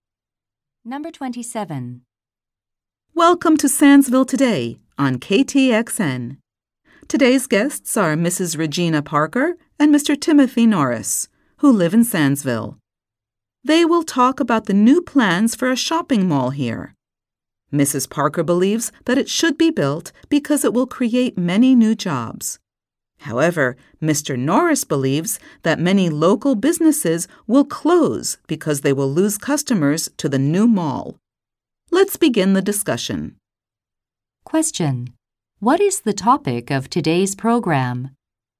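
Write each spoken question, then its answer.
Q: What is the topic of today's program?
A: Plans for a new shopping mall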